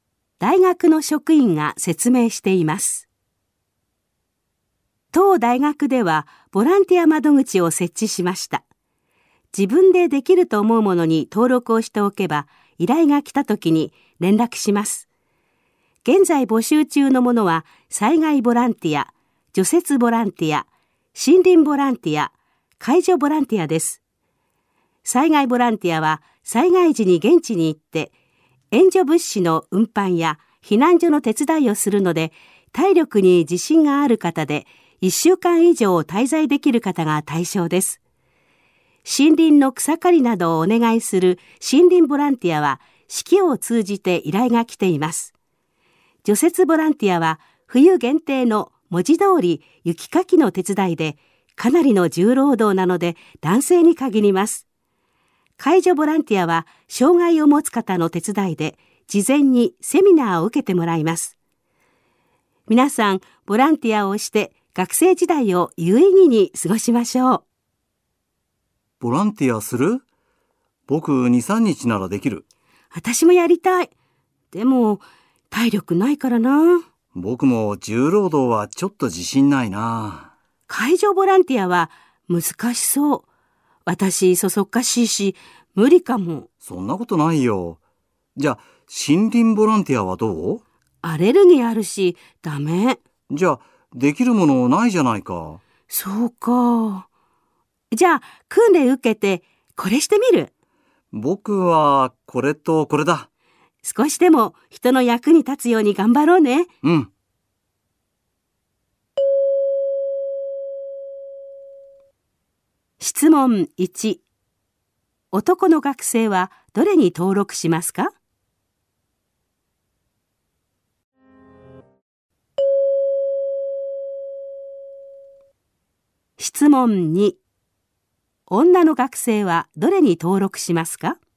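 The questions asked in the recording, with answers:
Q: 男の学生は、どれに登録しますか?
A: 森林ボランティアと介助ボランティア

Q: 女の学生はどれに登録しますか?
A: 介助ボランティア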